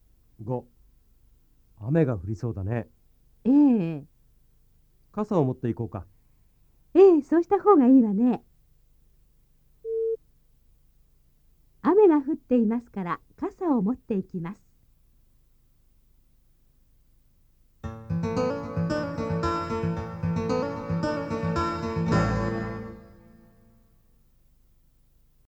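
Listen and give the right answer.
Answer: いいえ、まだ降っていません(降りそうです)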